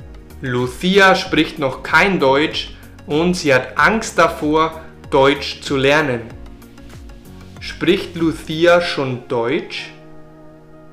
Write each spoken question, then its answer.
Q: Spricht Lucia schon Deutsch?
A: Nein, Lucia spricht noch kein Deutsch.